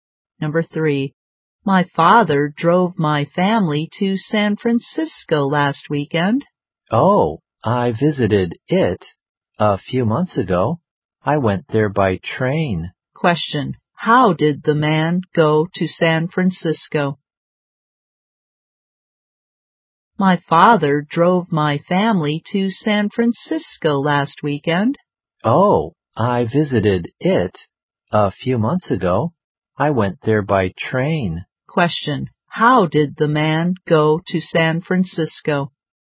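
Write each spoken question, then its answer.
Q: how did the man go to San Francisco?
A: By train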